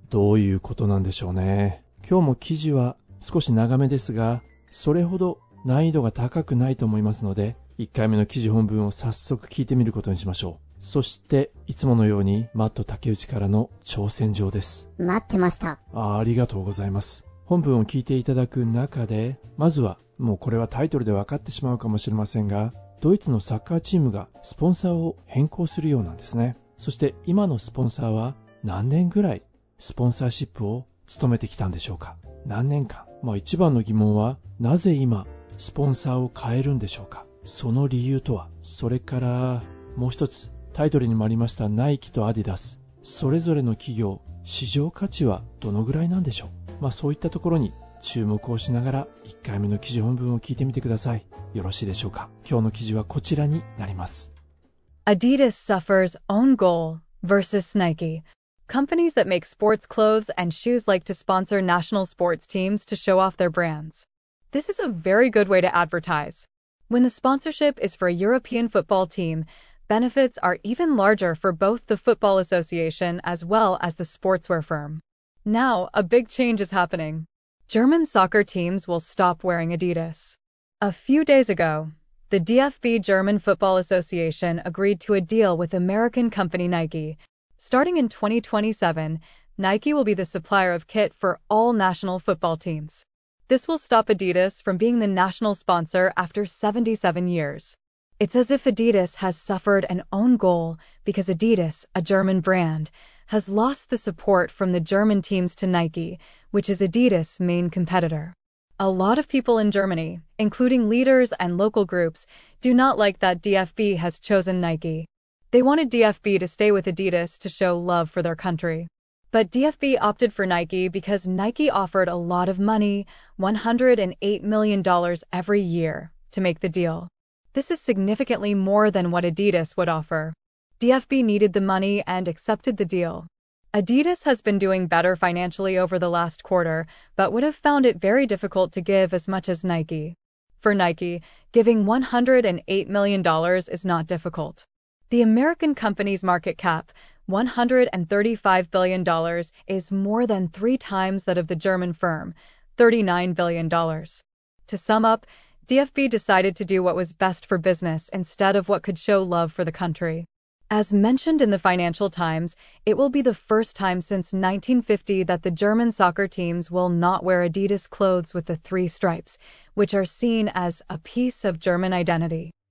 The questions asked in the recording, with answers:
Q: そして今のスポンサーは何年ぐらいスポンサーシップを務めてきたんでしょうか。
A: 77年もスポンサーシップやってたの ?77 年のナショナルスポンサーをアディダスは降りることになるんだね。

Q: 一番の疑問はなぜ今スポンサーを変えるんでしょうか。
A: なんだ、お金の問題なんだ。